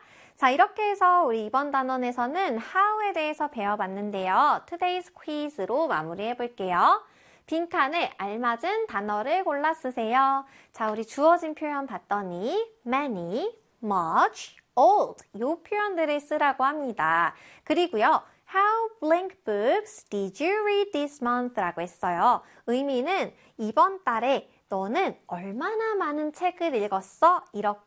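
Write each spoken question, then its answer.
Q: How blank books did you read this month?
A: many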